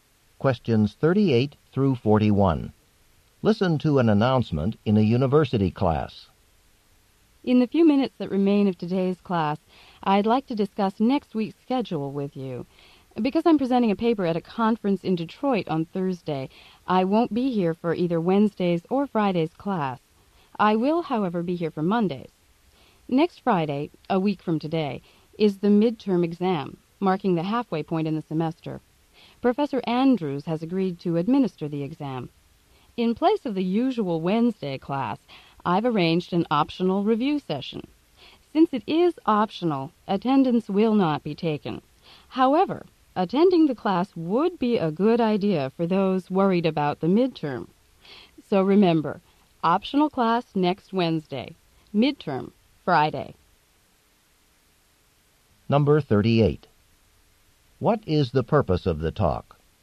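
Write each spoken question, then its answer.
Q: What is the purpose of the talk?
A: To discuss next week's class schedule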